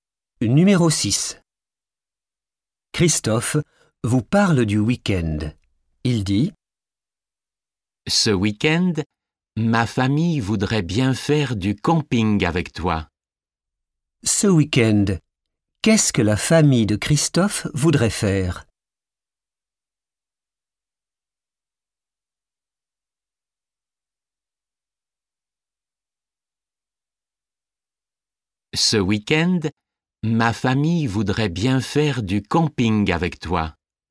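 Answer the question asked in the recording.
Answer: du camping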